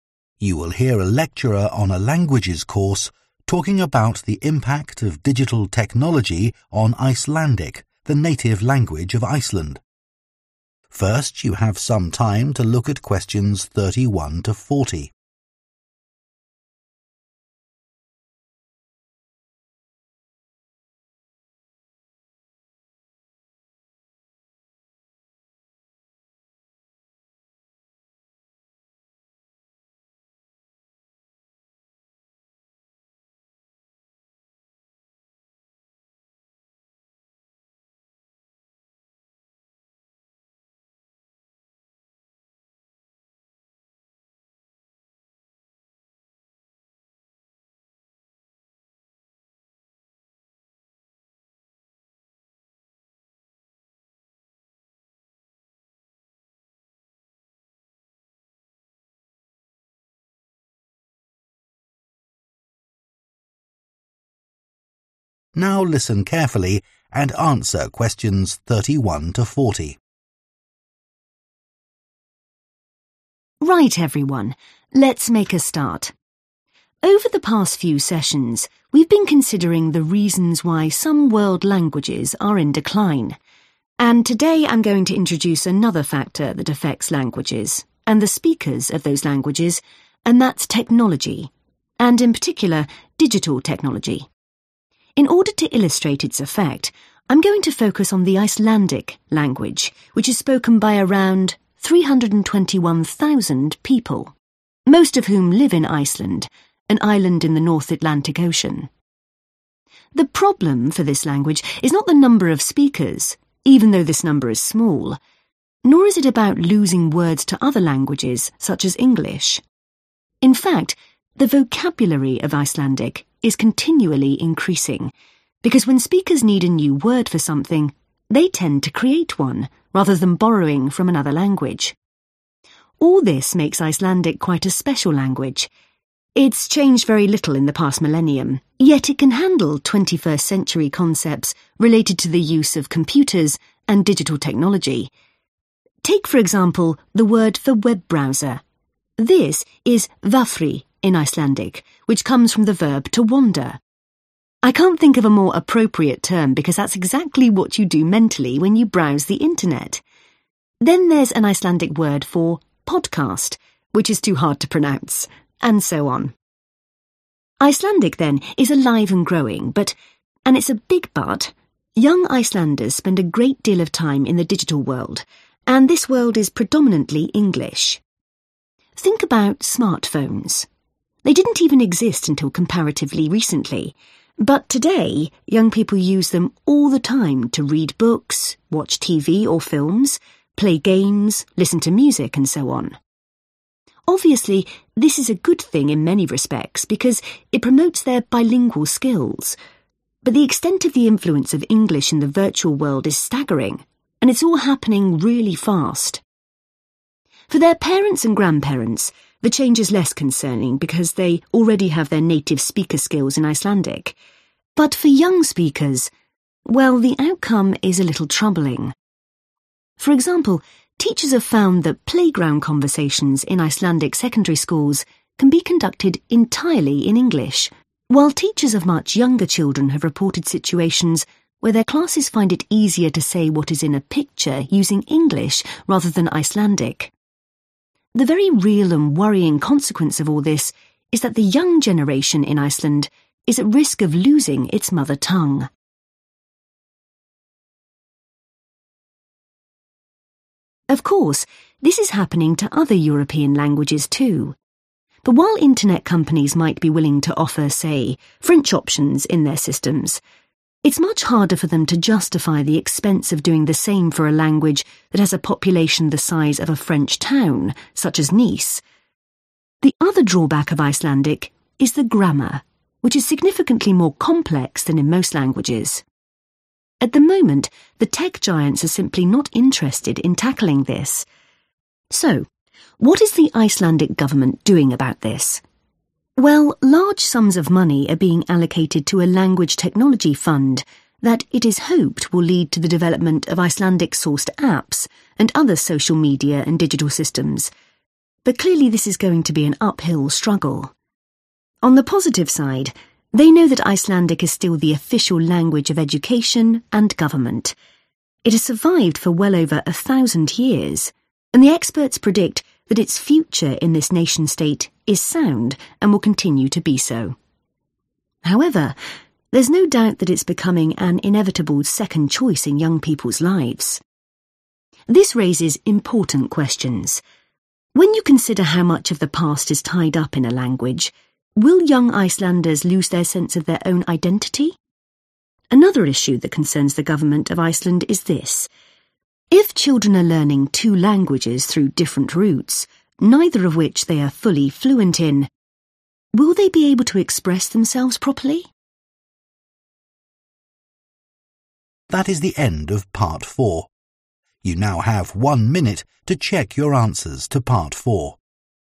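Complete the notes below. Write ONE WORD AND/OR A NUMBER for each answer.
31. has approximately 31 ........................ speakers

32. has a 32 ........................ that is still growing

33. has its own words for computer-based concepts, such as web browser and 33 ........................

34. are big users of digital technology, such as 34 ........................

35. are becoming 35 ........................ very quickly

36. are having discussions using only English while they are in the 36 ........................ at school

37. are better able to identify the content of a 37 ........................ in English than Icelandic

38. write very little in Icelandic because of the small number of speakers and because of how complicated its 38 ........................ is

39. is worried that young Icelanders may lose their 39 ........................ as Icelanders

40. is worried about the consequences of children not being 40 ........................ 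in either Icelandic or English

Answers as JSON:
{"31": "321,000", "32": "vocabulary", "33": "podcast", "34": "smartphones", "35": "bilingual", "36": "playground", "37": "picture", "38": "grammar", "39": "identity", "40": "fluent"}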